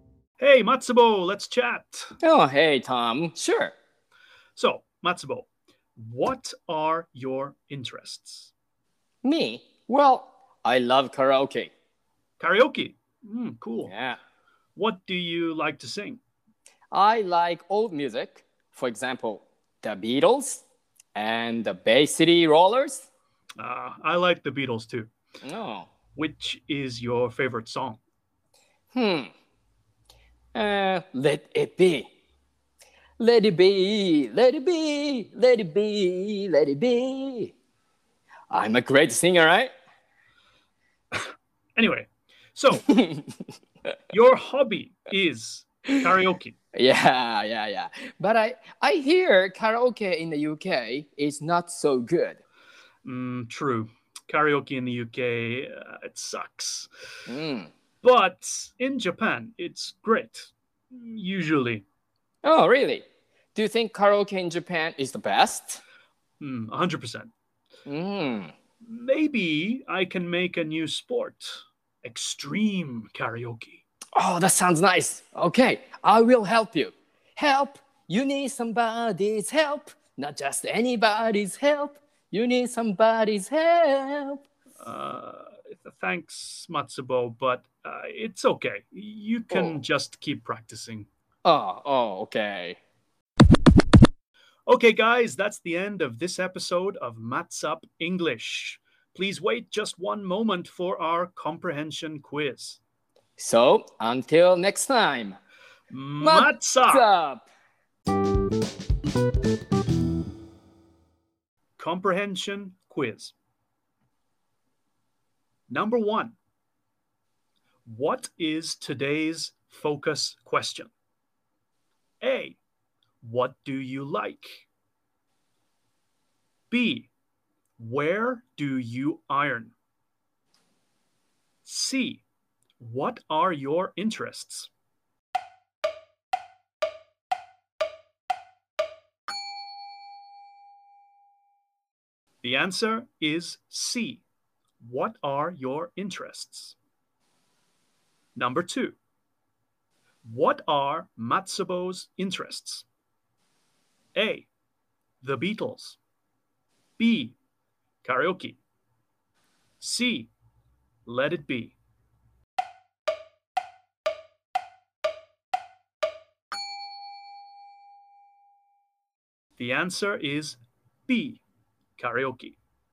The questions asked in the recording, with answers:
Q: what is today's focus question?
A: The answer is C. What are your interests?